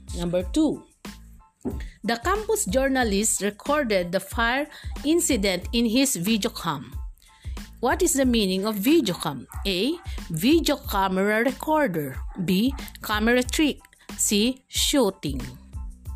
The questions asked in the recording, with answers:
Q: What is the meaning of videocam?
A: Yes, video camera recorder.